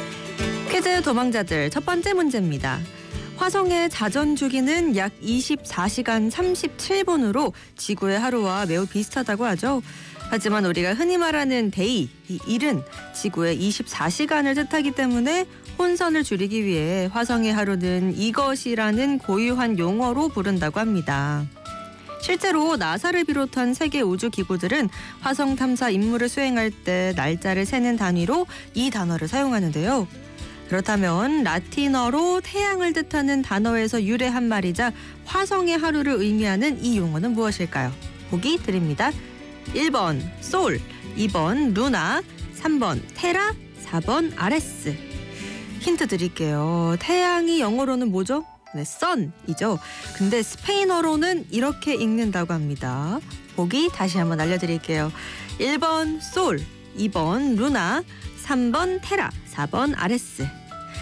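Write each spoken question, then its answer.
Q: 그렇다면 라틴어로 태양을 뜻하는 단어에서 유래한 말이자 화성의 하루를 의미하는 이 용어는 무엇일까요?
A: 1: 솔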